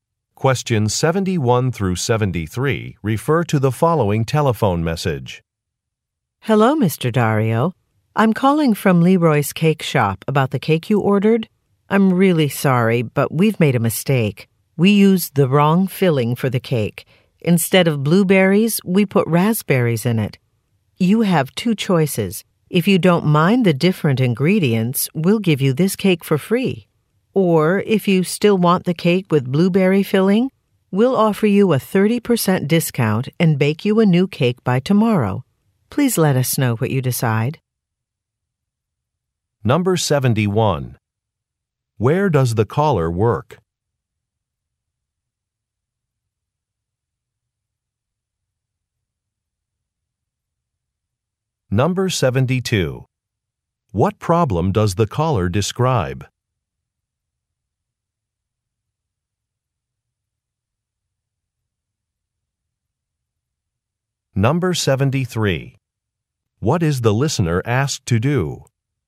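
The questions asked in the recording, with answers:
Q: Where does the caller work?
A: At a cake shop (Leroy's Cake Shop)

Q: What problem does the caller describe?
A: The wrong filling was used in the cake

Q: What is the listener asked to do?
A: Let the shop know what he decides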